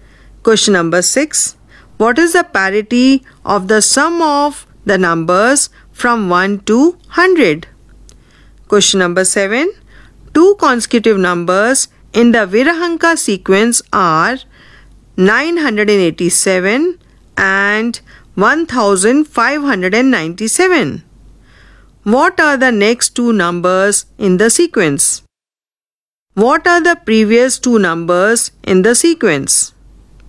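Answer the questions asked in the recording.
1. 2584 and 4181
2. 610 and 377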